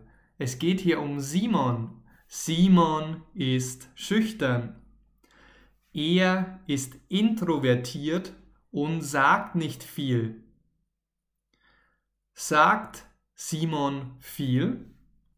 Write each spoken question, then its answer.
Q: Sagt Simon viel?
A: Nein, er sagt nicht viel.